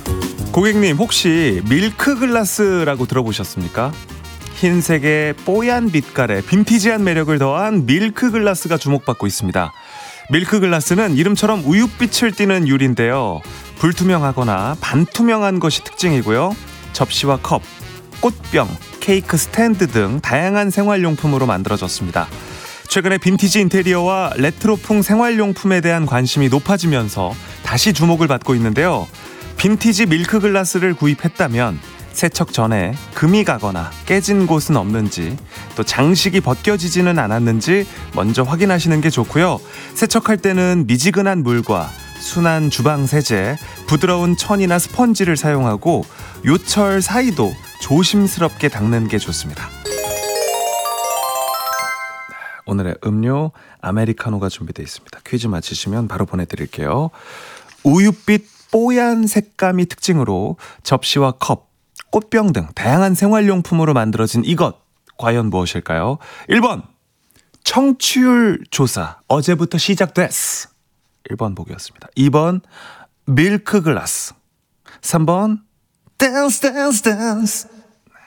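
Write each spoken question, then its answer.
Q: 우윳빛 뽀얀 색감이 특징으로 접시와 컵, 꽃병 등 다양한 생활용품으로 만들어진 이것, 과연 무엇일까요?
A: 2: 밀크글라스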